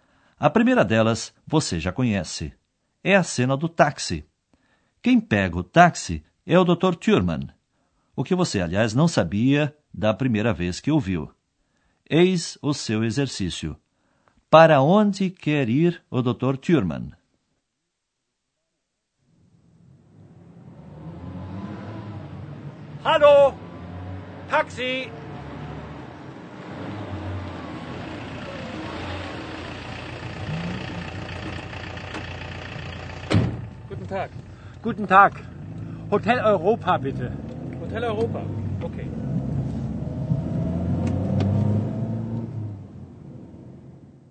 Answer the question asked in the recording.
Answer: O Dr. Thurman pediu ao motorista que o leve ao Hotel Europa.